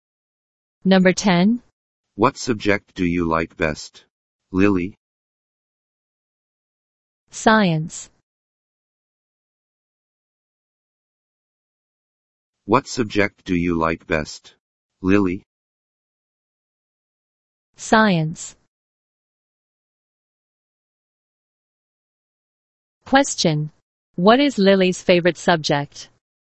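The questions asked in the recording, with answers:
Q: What is Lily's favorite subject?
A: Science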